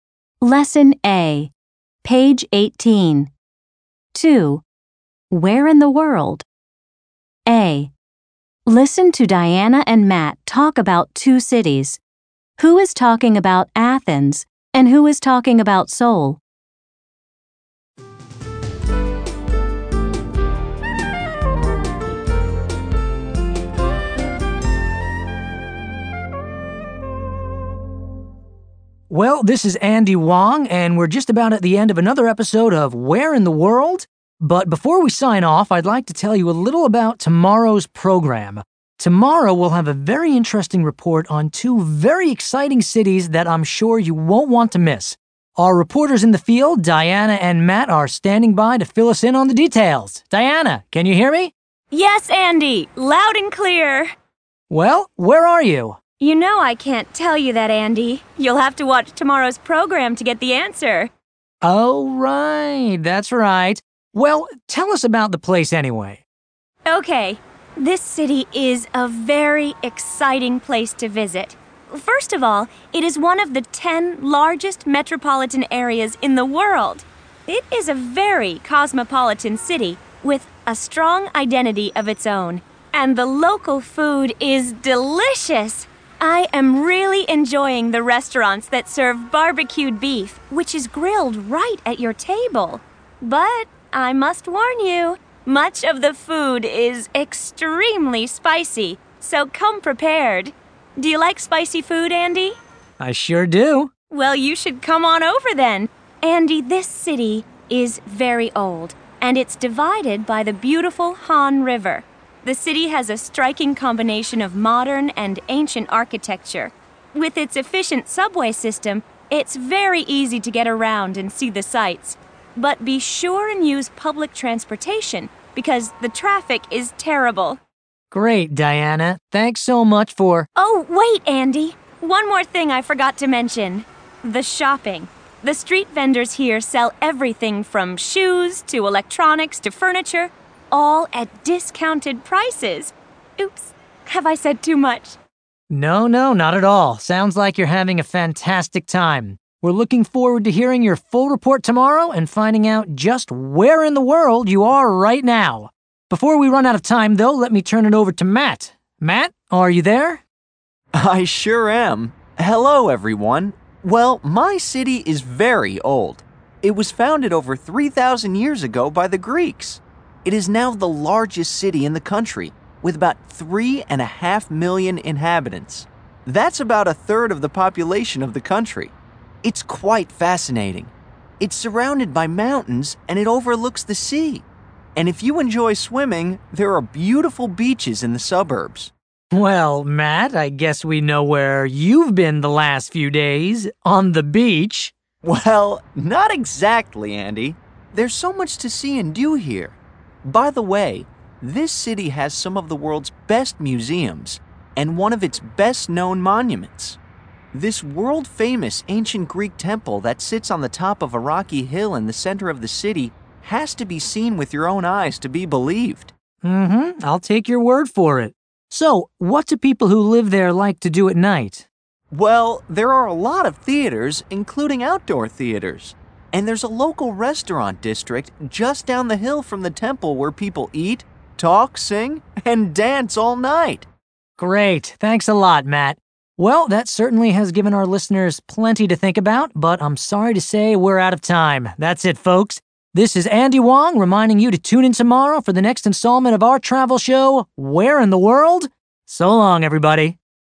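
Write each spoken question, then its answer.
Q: Who is talking about Athens and who is talking about Seoul?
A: Diana is talking about Seoul and Matt is talking about Athens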